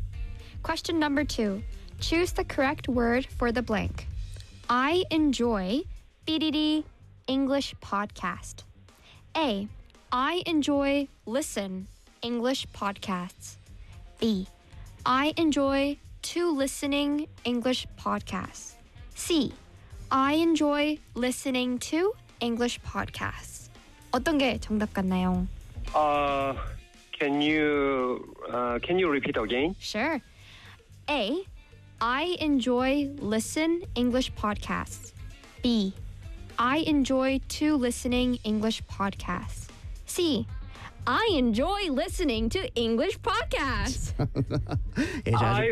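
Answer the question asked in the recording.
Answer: C: I enjoy listening to English podcasts.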